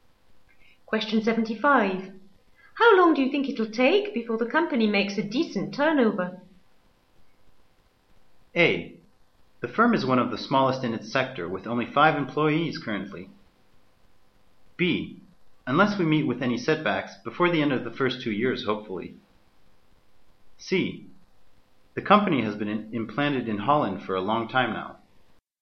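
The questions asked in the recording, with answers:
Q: How long do you think it'll take before the company makes a decent turnover?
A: B: Unless we meet with any setbacks, before the end of the first 2 years, hopefully.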